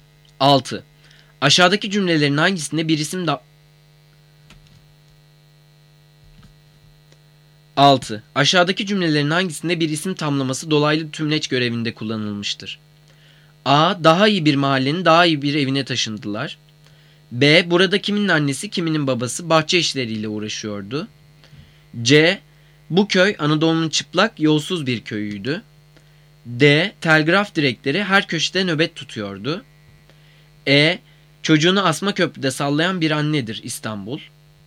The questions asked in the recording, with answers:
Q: Aşağıdaki cümlelerin hangisinde bir isim tamlaması dolaylı tümleç görevinde kullanılmıştır?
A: Cevap A. Daha iyi bir mahallenin daha iyi bir evine taşındılar.